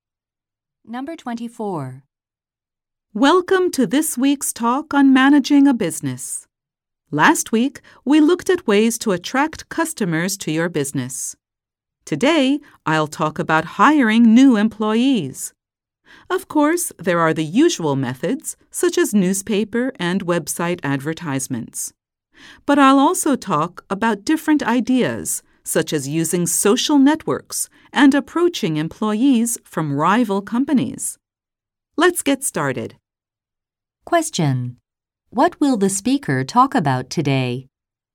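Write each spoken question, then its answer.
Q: What will the speaker talk about today?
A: Hiring new employees.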